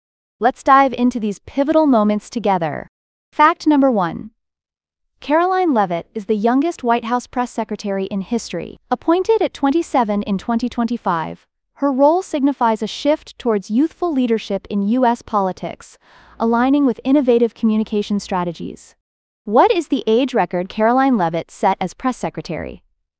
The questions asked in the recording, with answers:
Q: What is the age record Caroline Leavitt set as press secretary?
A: Correct answer, youngest ever.